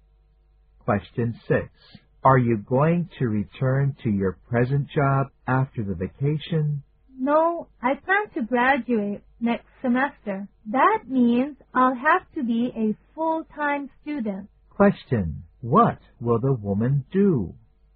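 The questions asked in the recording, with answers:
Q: What will the woman do?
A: Go back to school as a full-time student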